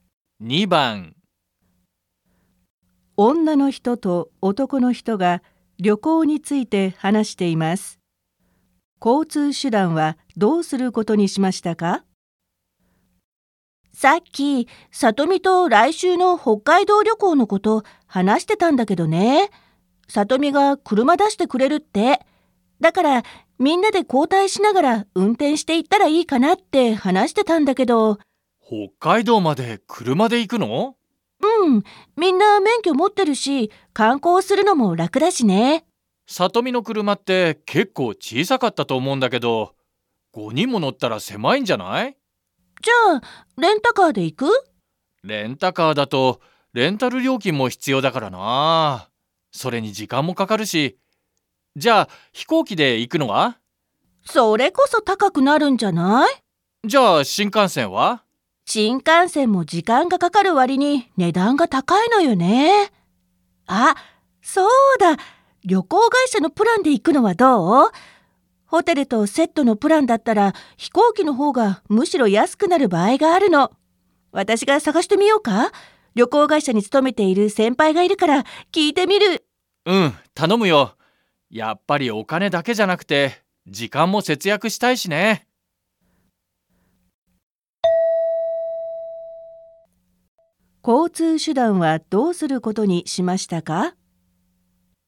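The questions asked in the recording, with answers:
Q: 交通手段はどうすることにしましたか?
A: 旅行会社のホテルとセットのプランで飛行機で行く

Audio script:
F:さっき、さとみと来週の北海道旅行のこと話してたんだけどね。さとみが車出してくれるって。だから、みんなで交代しながら運転して行ったらいいかなって話してたんだけど...
M:北海道まで車で行くの?Đi đến Hokkaido bằng xe oto hả?
F:うん、みんな免許持ってるし、観光するのも楽だしね。
M:さとみの車って結構小さかったと思うんだけど。
M:レンタカーだと、レンタル料金も必要だからなあ。それに時間もかかるし。
F:それこそ高くなるんじゃない?/ Máy bay mới tốn ấy!
F:新幹線も時間がかかる割に値段が高いのよね。あ、そうだ。旅行会社のプランで行くのはどう?ホテルとセットのプランだったから飛行機の方がむしろ安くなる場合があるの。私が探してみようか?旅行会社に勤めている先輩がいるから聞いてみる。
M:うん。頼むよ。やっぱりお金だけじゃなくて時間も節約したいしね。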